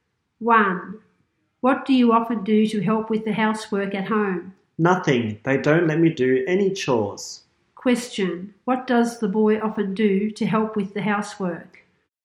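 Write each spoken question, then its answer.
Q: What does the boy often do to help with the housework?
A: Nothing; they don't let him do any chores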